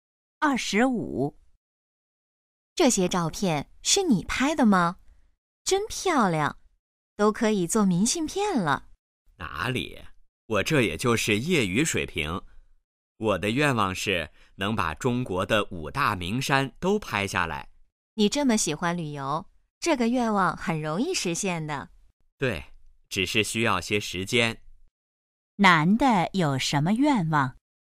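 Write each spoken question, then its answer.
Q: 男的有什么愿望?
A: 把中国的5大名山都拍下来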